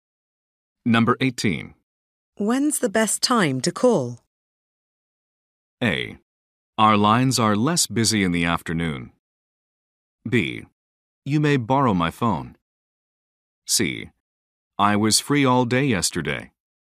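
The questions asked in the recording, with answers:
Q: When's the best time to call?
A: A: Our lines are less busy in the afternoon.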